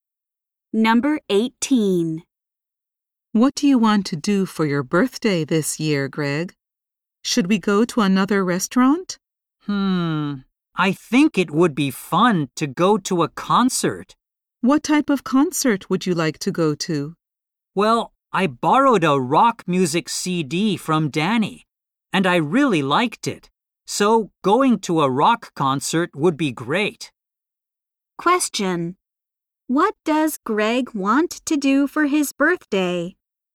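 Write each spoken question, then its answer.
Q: What does Greg want to do for his birthday?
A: Go to a rock concert.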